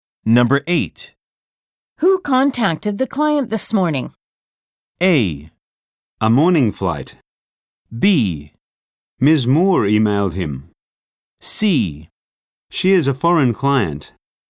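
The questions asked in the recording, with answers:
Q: Who contacted the client this morning?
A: B: Ms. Moore emailed him.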